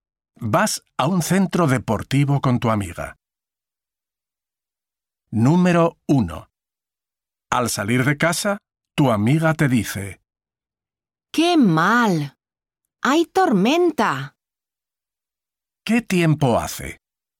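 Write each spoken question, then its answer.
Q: ¿Qué tiempo hace?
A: Hay tormenta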